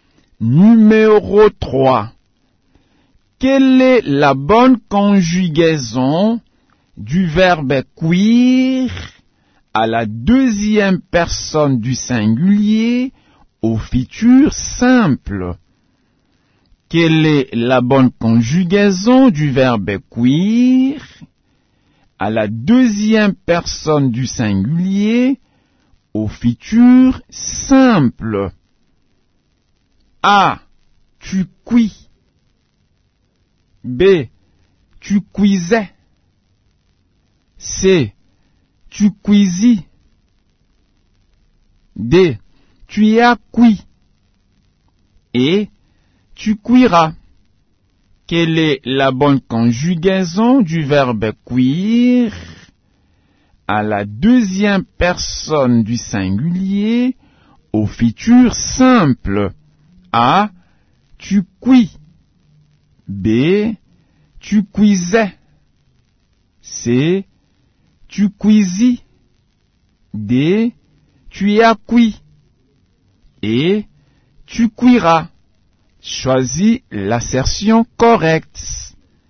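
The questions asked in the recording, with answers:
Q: Quelle est la bonne conjugaison du verbe cuire à la deuxième personne du singulier au futur simple?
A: E: Tu cuiras.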